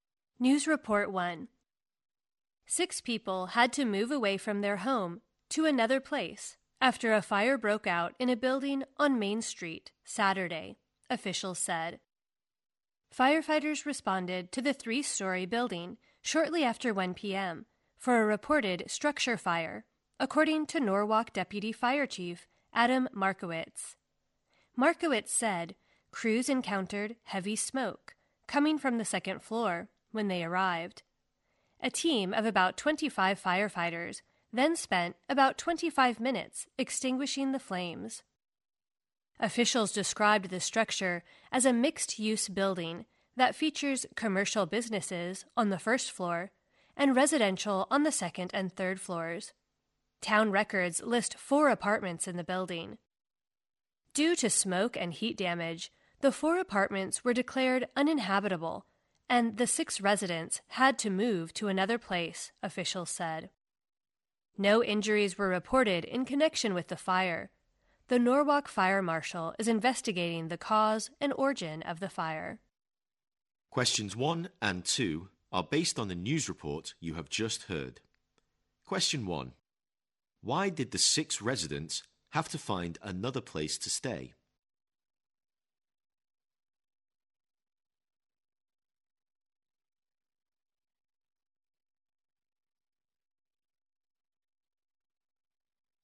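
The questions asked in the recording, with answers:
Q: Why did the 6 residents have to find another place to stay?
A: Smoke and heat damage made their apartments uninhabitable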